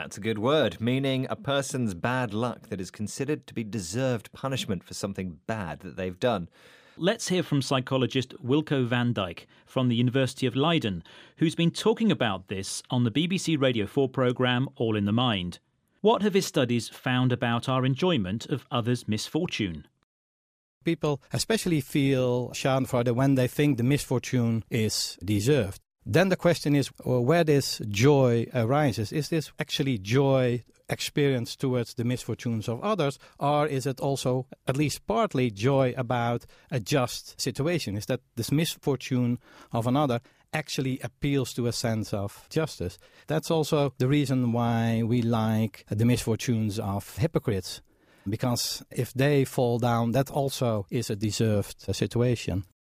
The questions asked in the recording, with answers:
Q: What have his studies found about our enjoyment of others' misfortune?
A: Okay, so Wilco van Dijk's studies found we get joy when someone's misfortune is deserved.